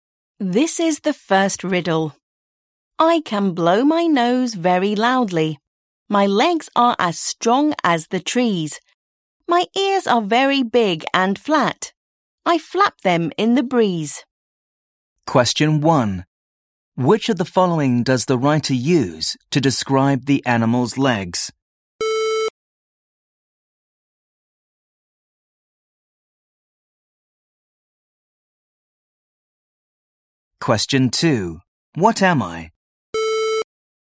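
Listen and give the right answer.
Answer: An elephant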